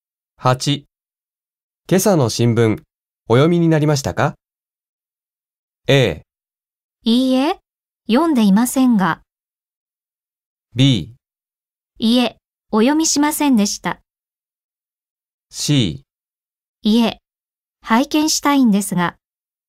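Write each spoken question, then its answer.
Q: 今朝の新聞、お読みになりましたか?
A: A: いいえ、読んでいませんが。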